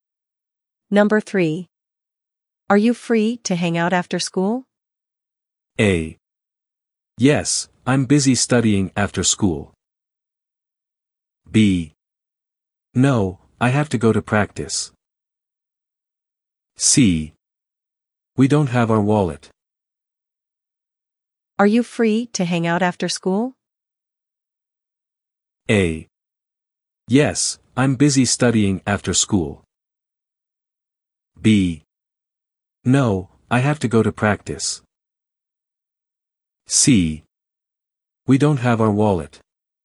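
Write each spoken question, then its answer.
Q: Are you free to hang out after school?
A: B: No, I have to go to practice.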